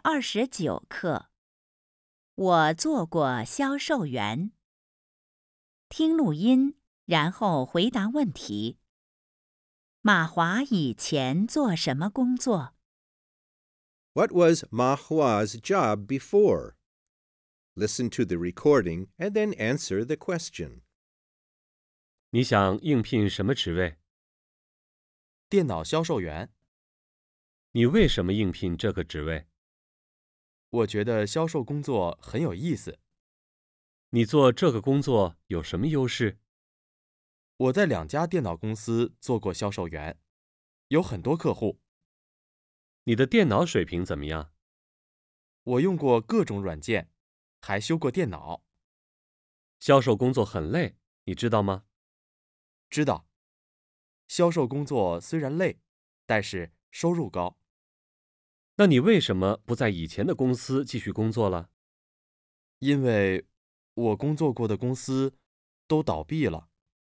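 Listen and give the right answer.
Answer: 电脑销售员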